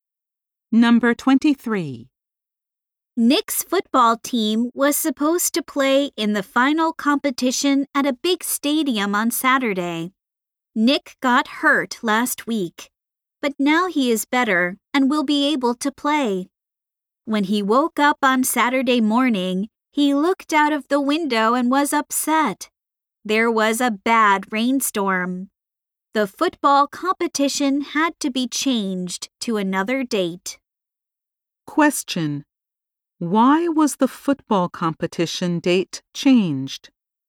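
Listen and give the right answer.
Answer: There was a bad rainstorm.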